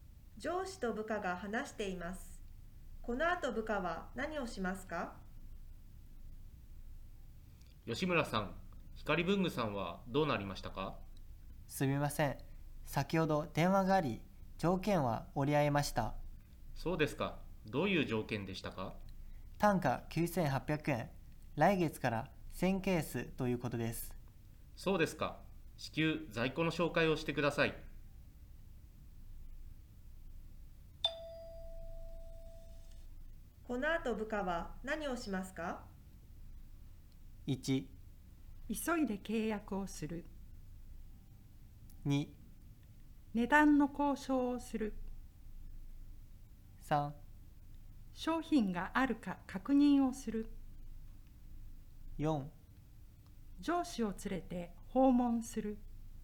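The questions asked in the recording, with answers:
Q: このあと部下は何をしますか?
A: 3: 商品があるか確認をする。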